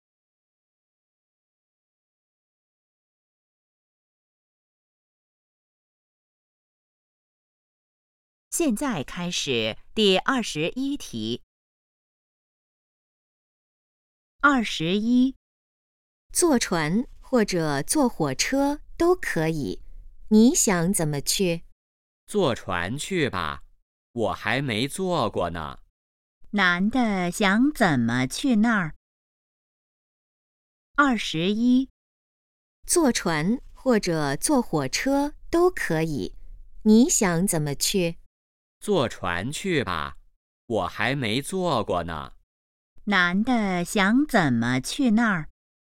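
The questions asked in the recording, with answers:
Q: 男的想怎么去那儿?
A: 坐船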